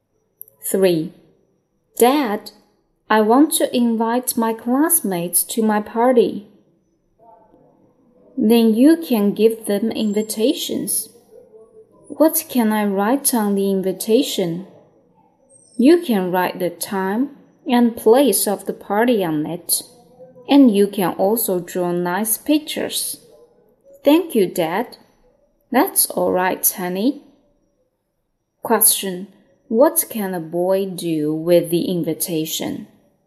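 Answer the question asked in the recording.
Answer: Write the time and place of the party on it and draw nice pictures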